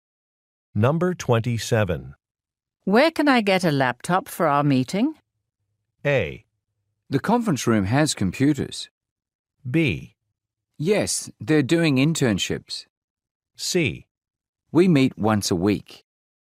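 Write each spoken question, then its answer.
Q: Where can I get a laptop for our meeting?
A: A: The conference room has computers.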